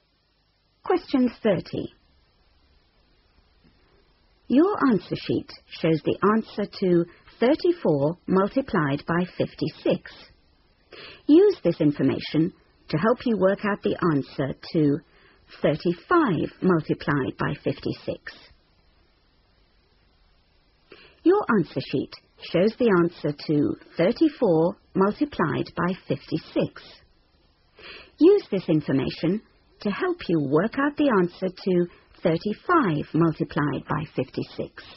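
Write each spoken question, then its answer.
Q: Use this information to help you work out the answer to 35 multiplied by 56.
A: 1960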